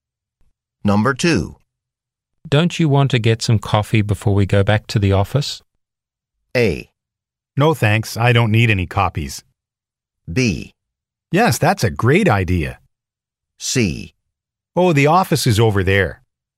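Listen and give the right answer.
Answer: B: Yes, that's a great idea.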